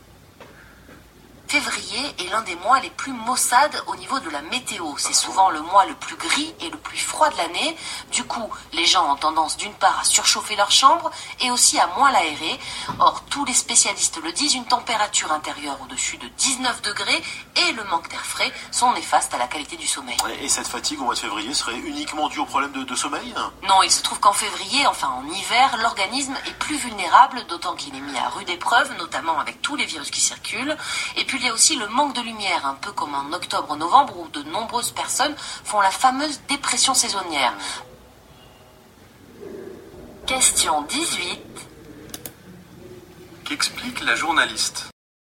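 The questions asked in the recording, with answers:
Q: Qu'explique la journaliste?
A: Les causes de la fatigue en février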